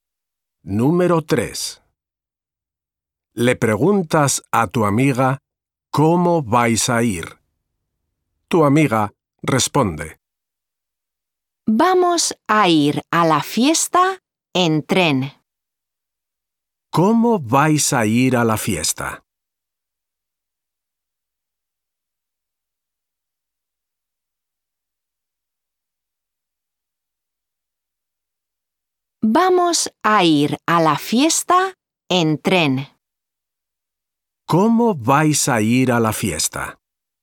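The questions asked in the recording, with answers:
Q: ¿Cómo vais a ir a la fiesta?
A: En tren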